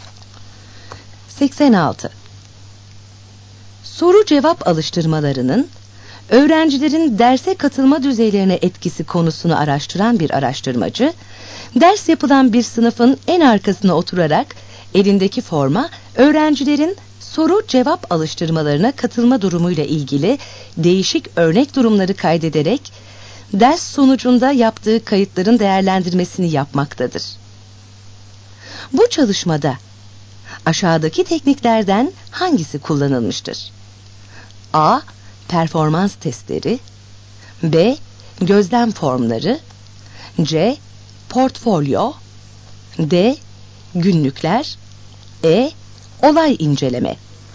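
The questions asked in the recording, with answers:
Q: Bu çalışmada aşağıdaki tekniklerden hangisi kullanılmıştır?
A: B: Gözlem formları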